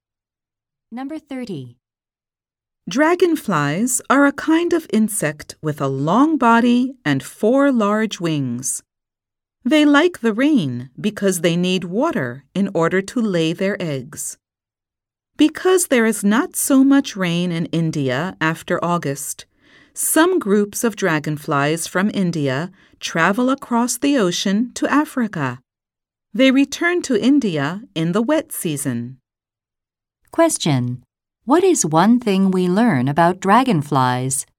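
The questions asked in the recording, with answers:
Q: What is one thing we learn about dragonflies?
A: Some travel from India across the ocean to Africa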